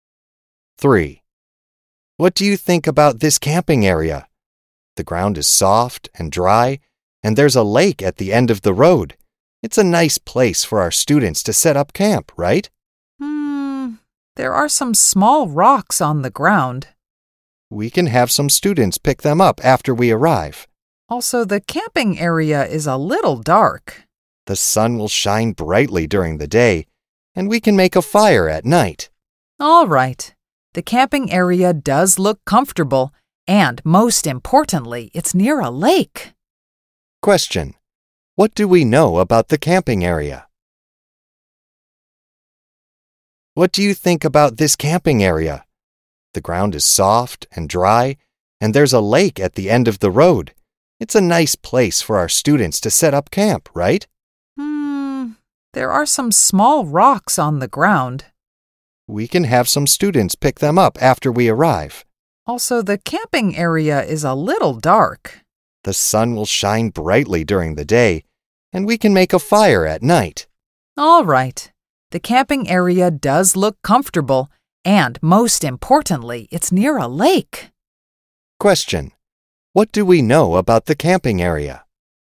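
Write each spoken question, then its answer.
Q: Question, what do we know about the camping area?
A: It is near a lake, and the ground is soft and dry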